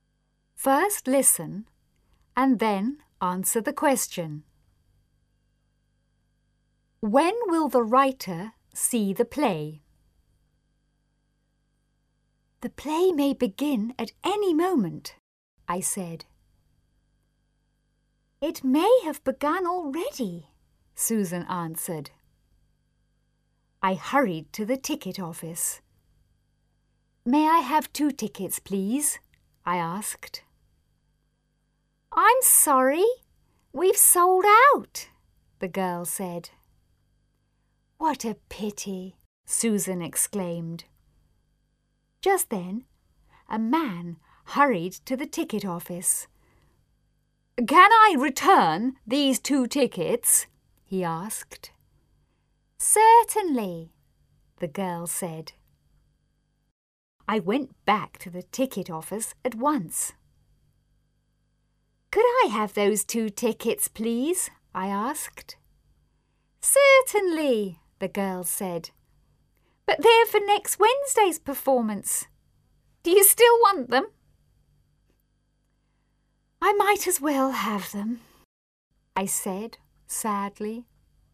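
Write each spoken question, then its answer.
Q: When will the writer see the play?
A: Next Wednesday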